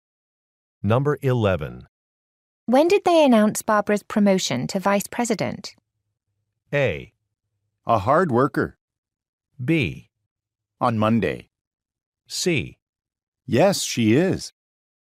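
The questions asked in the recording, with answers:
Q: When did they announce Barbara's promotion to vice president?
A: B: On Monday.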